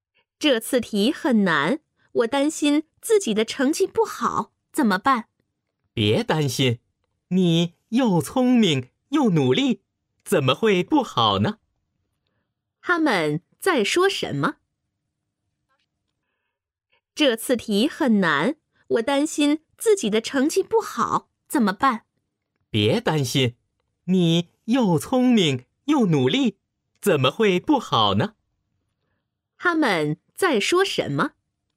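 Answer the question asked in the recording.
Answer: 考试成绩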